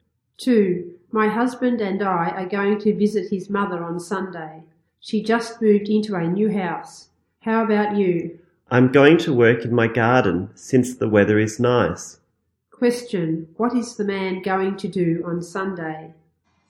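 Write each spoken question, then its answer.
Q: Question, what is the man going to do on Sunday?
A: Work in his garden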